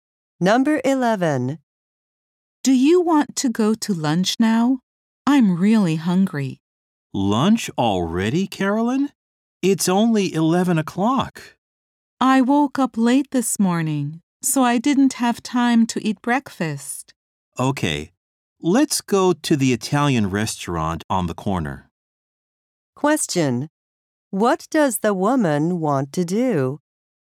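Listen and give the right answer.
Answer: Go to lunch now (she skipped breakfast).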